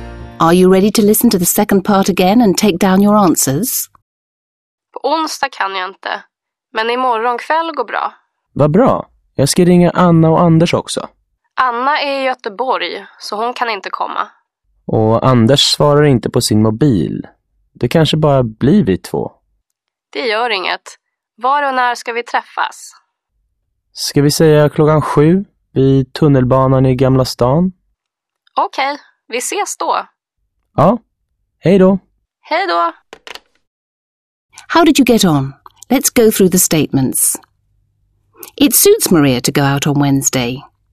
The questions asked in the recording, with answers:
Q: It suits Maria to go out on Wednesday.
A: False. Maria can't go out on Wednesday, so the next night suits her.